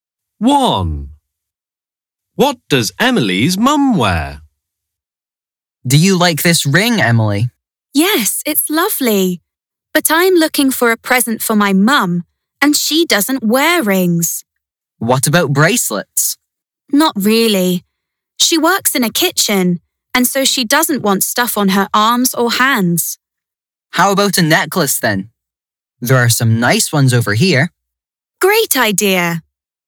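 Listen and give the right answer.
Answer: A necklace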